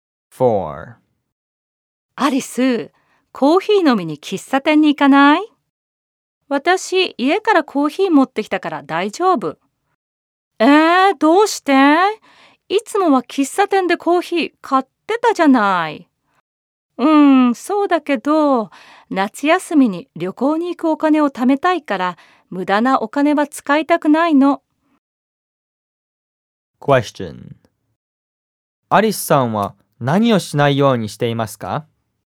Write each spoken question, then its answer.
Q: アリスさんは何をしないようにしていますか?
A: アリスさんは無駄なお金を使わないようにしています。